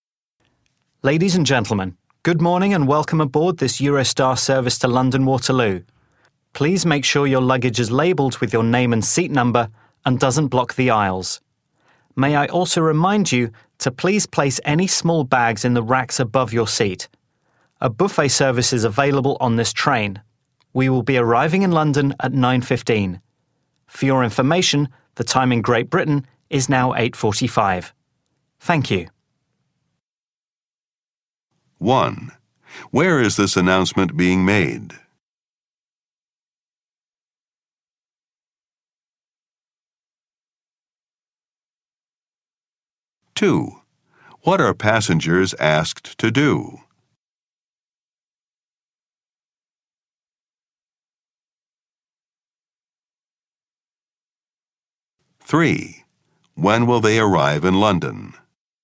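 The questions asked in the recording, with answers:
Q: Where is this announcement being made?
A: On a Eurostar train to London Waterloo

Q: When will they arrive in London?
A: At 9:15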